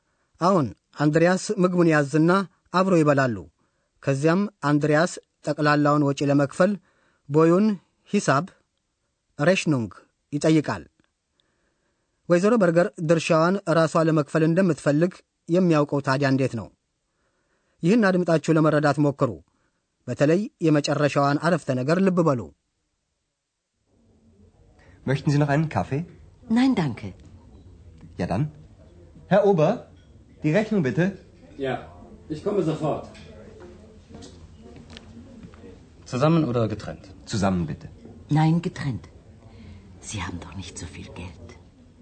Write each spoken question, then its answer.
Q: ወይዘሮ በርገር ድርሻዋን ራሷ ለመክፈል እንደምትፈልግ የሚያውቀው ታዲያ እንዴት ነው?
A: ወይዘሮ በርገር ግን ድርሻዋን ራሷ ለመክፈል ነው የምትፈልገው። ናይን ግትሬንት።